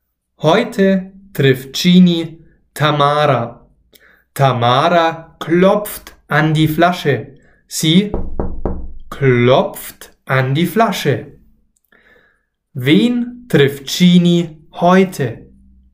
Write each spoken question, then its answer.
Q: Wen trifft Genie heute?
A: Tamara. Genie trifft heute Tamara.